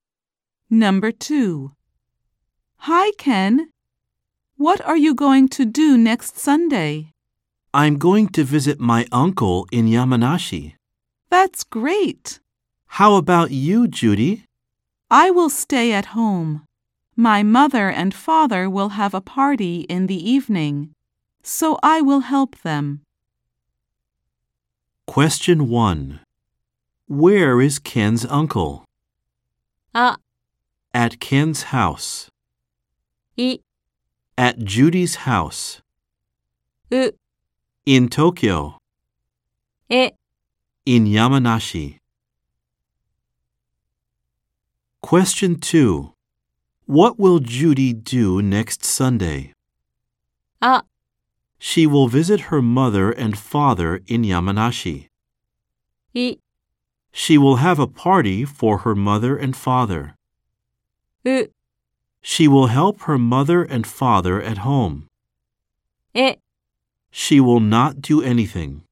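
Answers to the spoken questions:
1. え: In Yamanashi.
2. う: She will help her mother and father at home.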